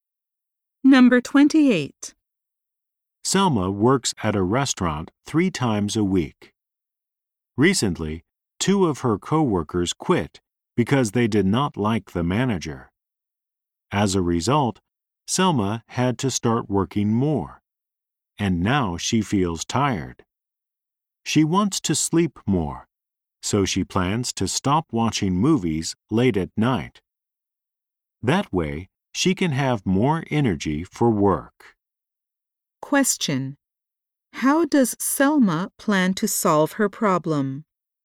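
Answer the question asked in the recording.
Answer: By stopping watching movies late at night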